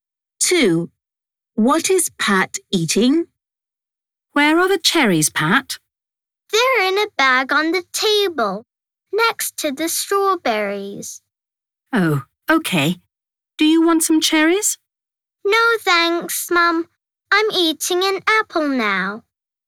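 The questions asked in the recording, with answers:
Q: What is Pat eating?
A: an apple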